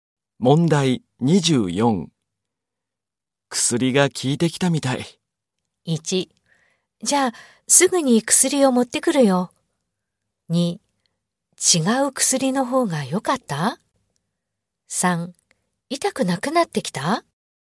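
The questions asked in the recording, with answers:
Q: 薬が効いてきたみたい。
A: 2: 痛くなくなってきた?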